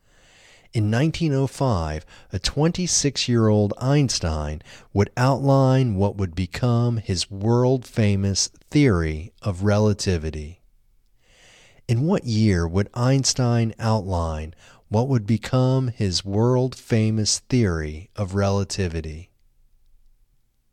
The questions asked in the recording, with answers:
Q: In what year would Einstein outline what would become his world-famous theory of relativity?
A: In 1905, Einstein would outline what would become his world-famous theory of relativity.